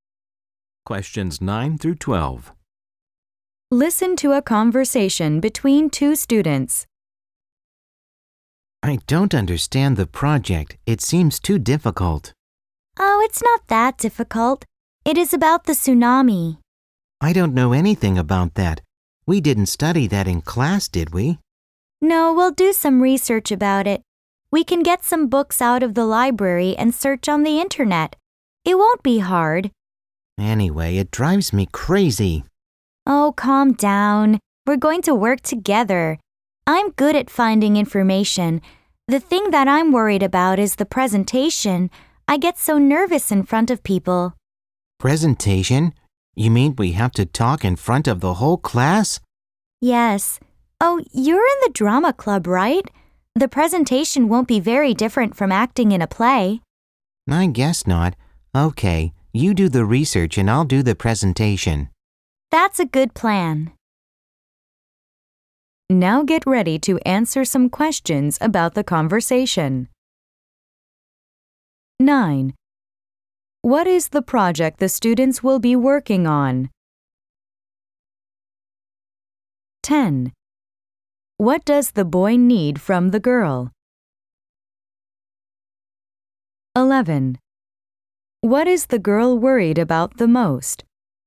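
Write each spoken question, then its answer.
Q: What is the project the students will be working on?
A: A project about the tsunami

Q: What is the girl worried about the most?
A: The presentation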